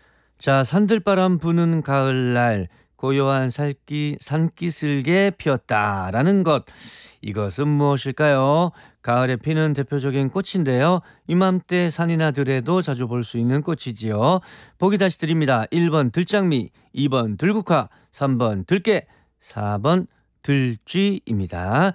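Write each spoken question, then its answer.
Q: 이것은 무엇일까요?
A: 2번: 들국화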